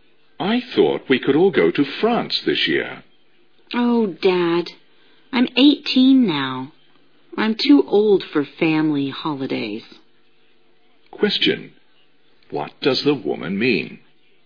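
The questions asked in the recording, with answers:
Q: What does the woman mean?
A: She doesn't want to go on a family holiday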